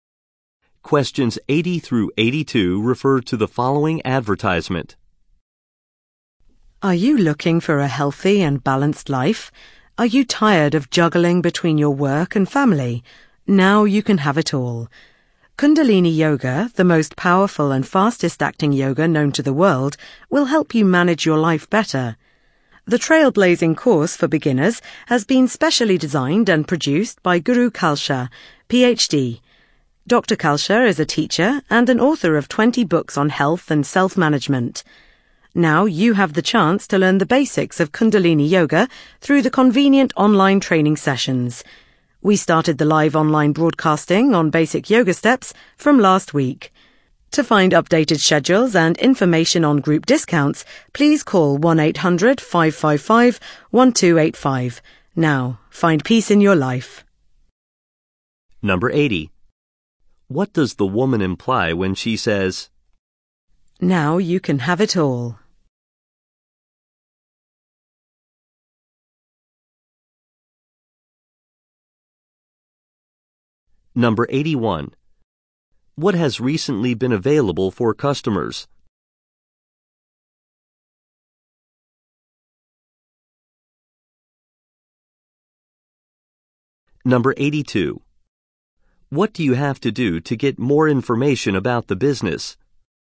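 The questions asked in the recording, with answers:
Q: What does the woman imply when she says, "Now you can have it all"?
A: Yoga can help you balance work and family life

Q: What has recently been available for customers?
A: Live online broadcasts of basic yoga lessons

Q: What do you have to do to get more information about the business?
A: Call 1-800-555-1285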